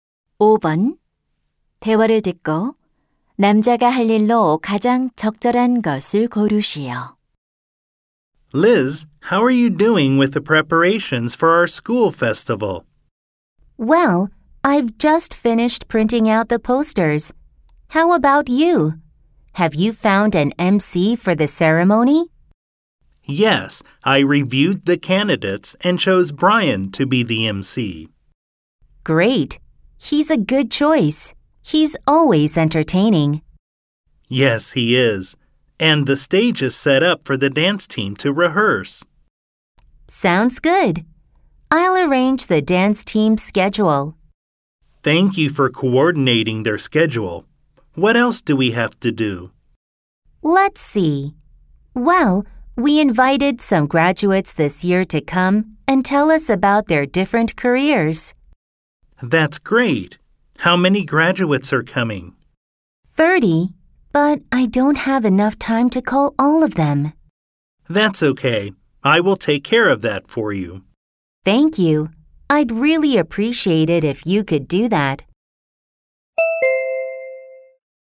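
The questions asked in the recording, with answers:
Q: 대화를 듣고 남자가 할 일로 가장 적절한 것을 고르시오.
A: 졸업생들에게 전화하기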